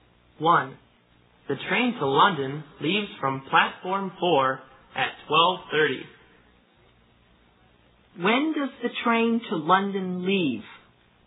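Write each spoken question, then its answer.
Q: When does the train to London leave?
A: At 12:30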